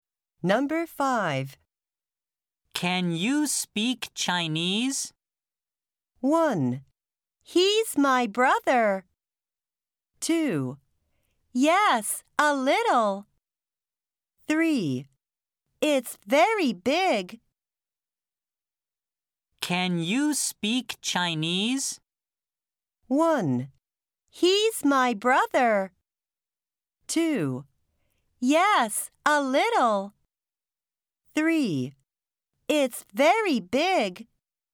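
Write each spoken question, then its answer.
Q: Can you speak Chinese?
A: 2: Yes, a little.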